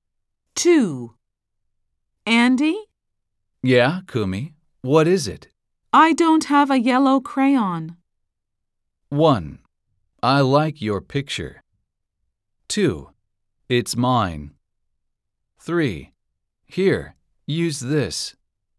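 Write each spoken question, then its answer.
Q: I don't have a yellow crayon.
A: 3: Here, use this.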